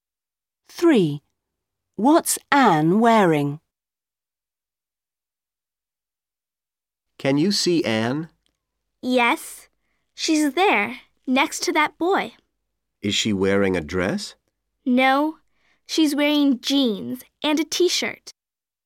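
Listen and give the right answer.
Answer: Jeans and a t-shirt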